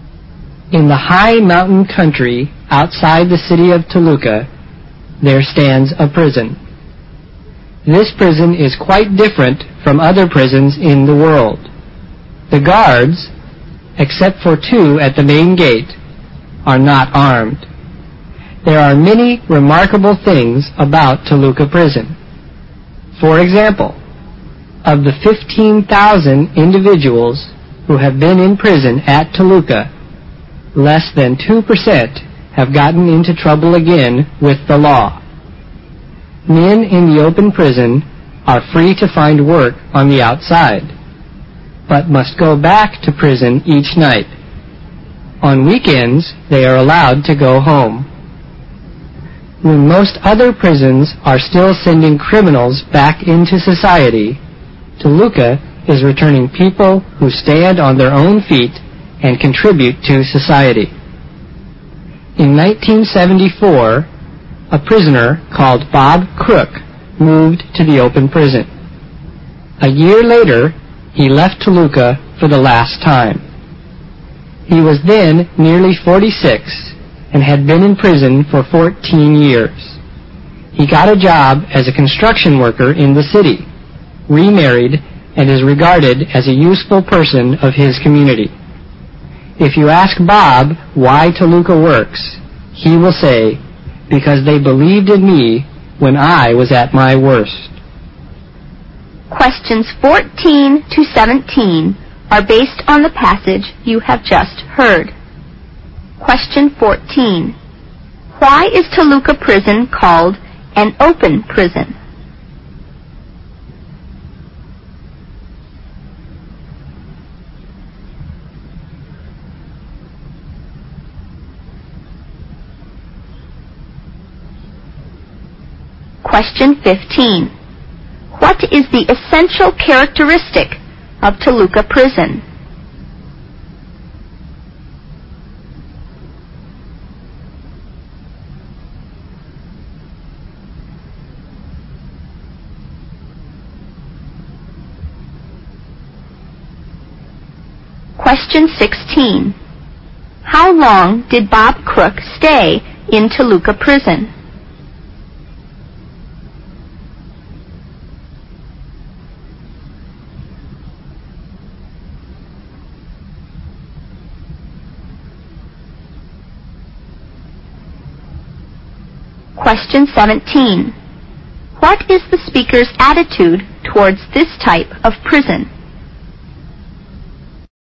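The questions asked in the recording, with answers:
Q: Why is Toluca Prison called an open prison?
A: Prisoners are free to work outside during the day and go home on weekends, returning to prison each night.

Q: What is the speaker's attitude towards this type of prison?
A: Approving; the speaker thinks highly of it.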